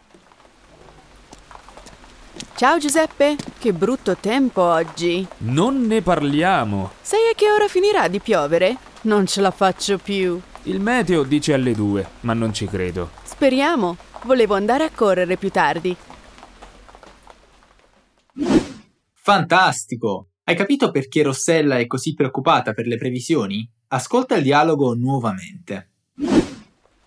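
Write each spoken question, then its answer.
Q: Hai capito perché Rossella è così preoccupata per le previsioni?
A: Perché voleva andare a correre più tardi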